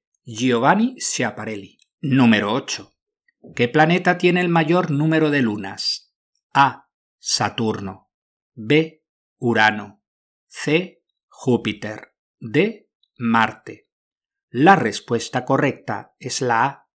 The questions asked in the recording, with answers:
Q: ¿Qué planeta tiene el mayor número de lunas?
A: La respuesta correcta es la A. Saturno.